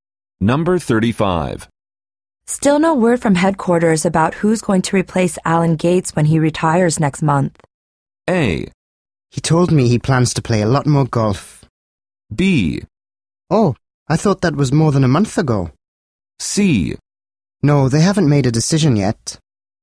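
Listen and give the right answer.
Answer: C: No, they haven't made a decision yet.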